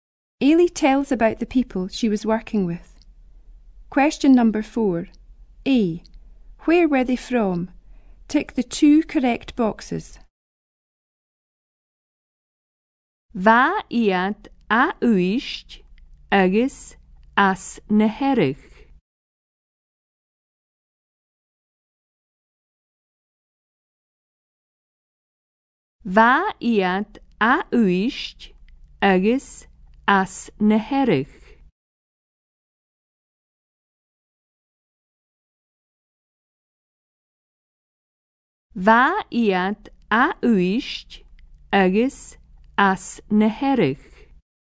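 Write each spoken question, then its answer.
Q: Where were they from?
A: Uist and Harris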